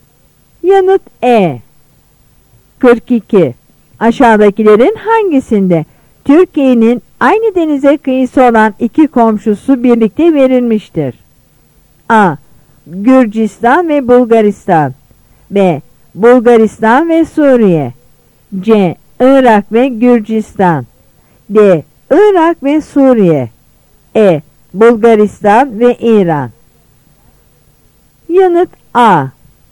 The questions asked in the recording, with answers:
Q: Aşağıdakilerin hangisinde Türkiye'nin aynı denize kıyısı olan iki komşusu birlikte verilmiştir?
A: Yanıt A.